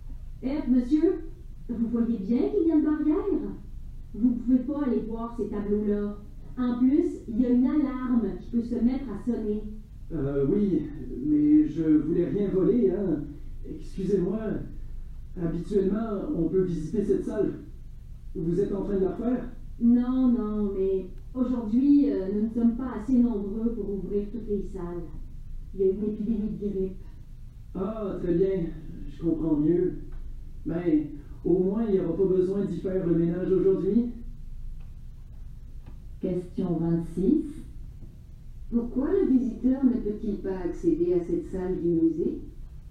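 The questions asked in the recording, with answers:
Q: Pourquoi le visiteur ne peut-il pas accéder à cette salle du musée?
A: Il n'y a pas assez de personnel à cause d'une épidémie de grippe.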